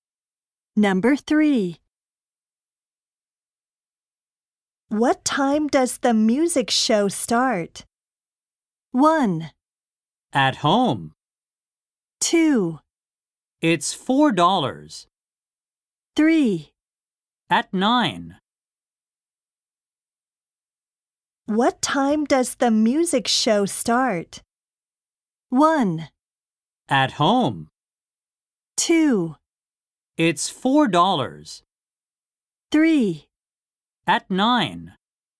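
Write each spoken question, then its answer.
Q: What time does the music show start?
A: 3: At 9.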